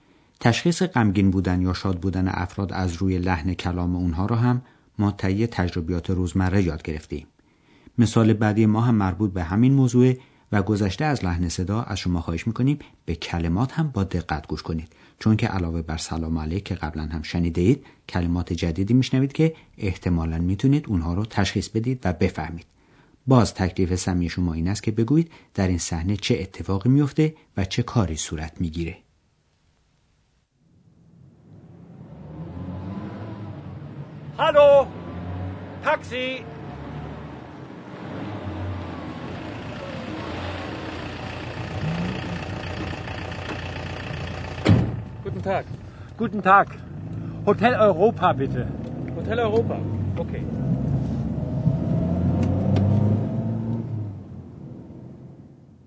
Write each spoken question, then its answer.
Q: بگویید در این صحنه چه اتفاقی میفته و چه کاری صورت میگیره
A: مردی در کنار خیابان ایستاده و تاکسی صدا میزنه